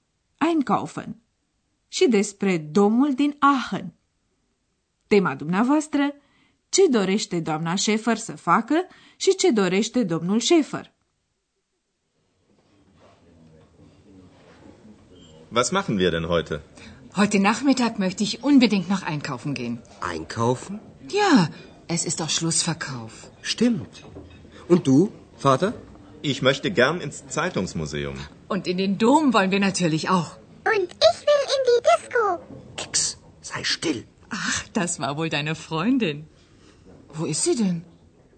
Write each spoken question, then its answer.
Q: Tema dumneavoastră, ce dorește doamna Schäfer să facă și ce dorește domnul Schäfer?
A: Doamna Schäfer vrea să facă cumpărături, domnul Schäfer vrea să viziteze muzeul presei și amândoi vor să vadă domul.